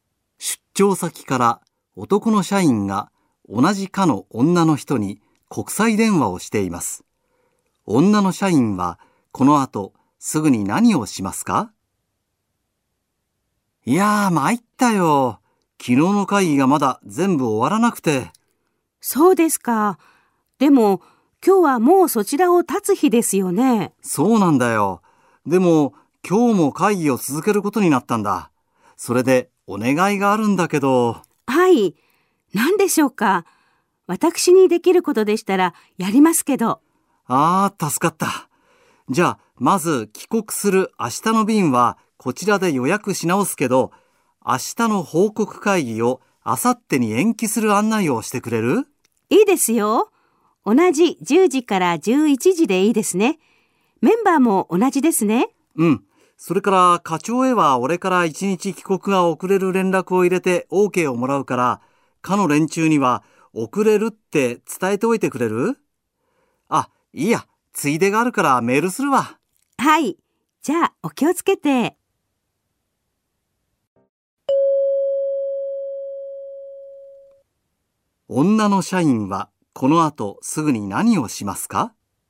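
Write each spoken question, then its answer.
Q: 女の社員はこの後すぐに何をしますか?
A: 明日の報告会議を明後日に延期する案内をする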